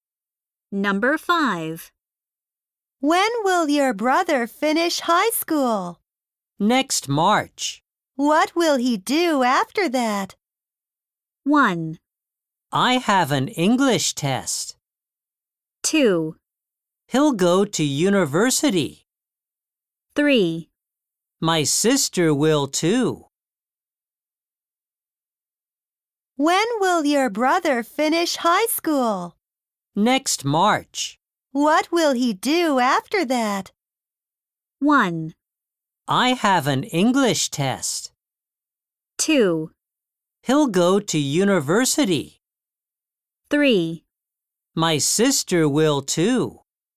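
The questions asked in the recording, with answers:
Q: What will he do after that?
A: 2: He'll go to university.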